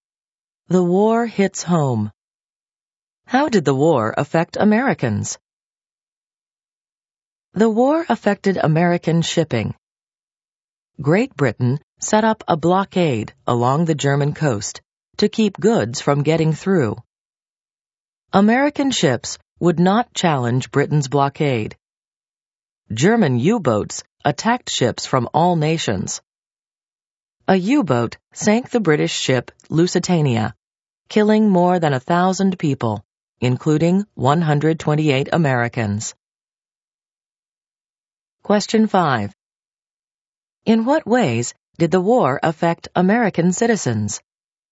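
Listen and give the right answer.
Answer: It disrupted American shipping through the British blockade and German U-boat attacks, and Americans were killed when the Lusitania was sunk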